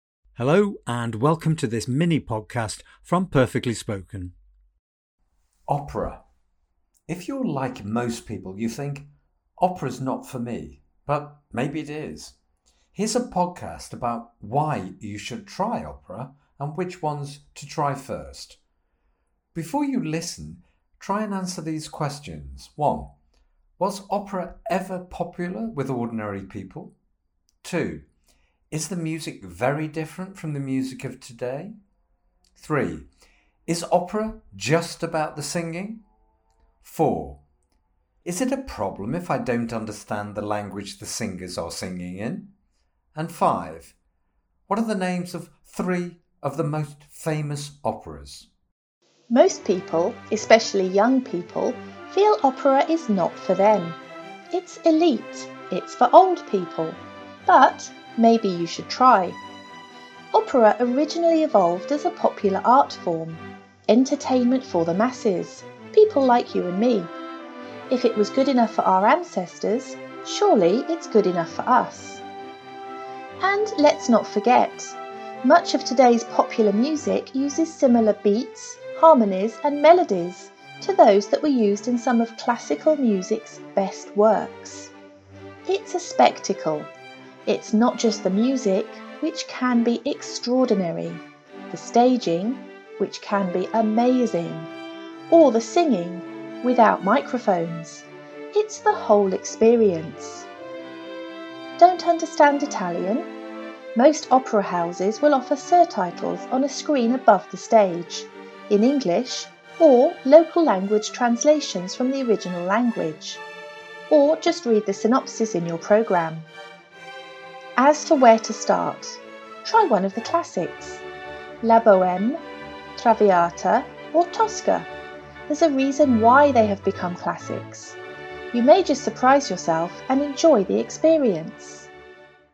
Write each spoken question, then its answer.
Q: Was opera ever popular with ordinary people?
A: Yes, number one, it was always popular with ordinary people.

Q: Is the music very different from the music of today?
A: Well, not really. Many of today's beats and harmonies have evolved, have grown from opera.

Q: Is opera just about the singing?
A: No, of course not. It's about the whole experience, including the music and the staging.

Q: Is it a problem if I don't understand the language the singers are singing in?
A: Well, not really. Most people don't.

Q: What are the names of 3 of the most famous operas?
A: Well, of course, we've got La Bohème, Traviata and Tosca.